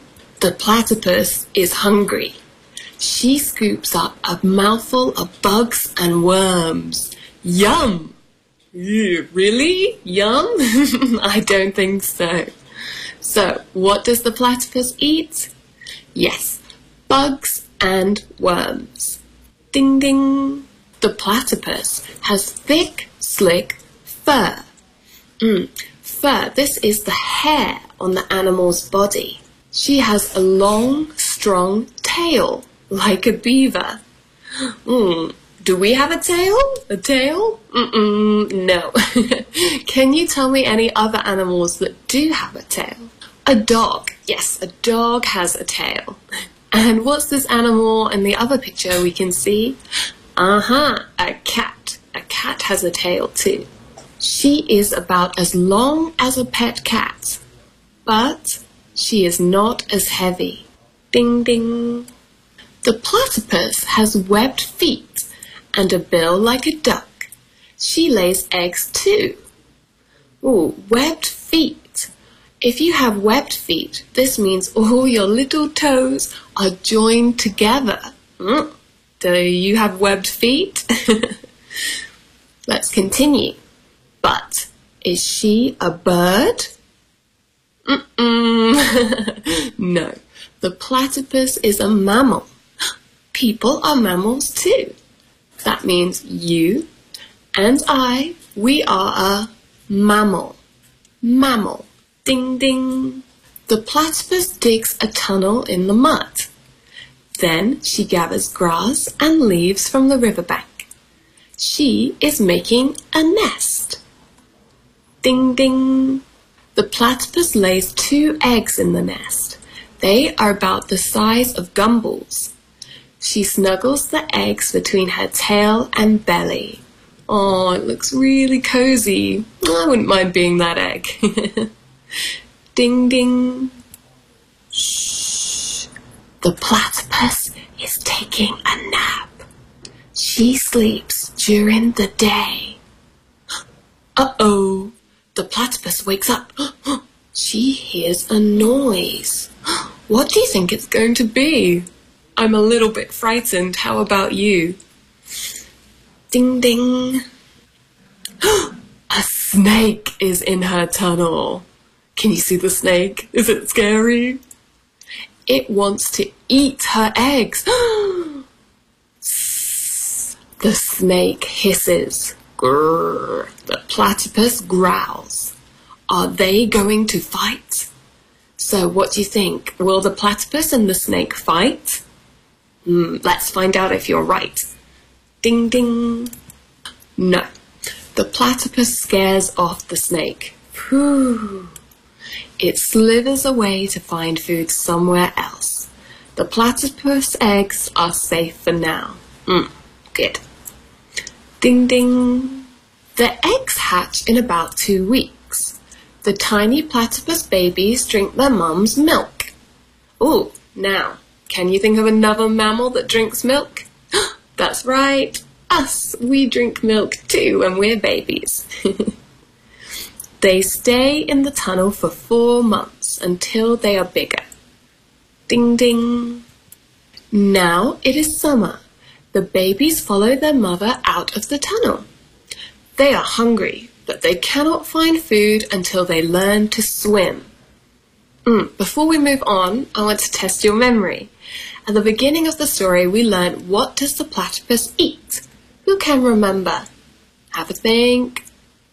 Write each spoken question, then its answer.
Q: At the beginning of the story, we learned what does the platypus eat?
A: Good job. They eat bugs and worms.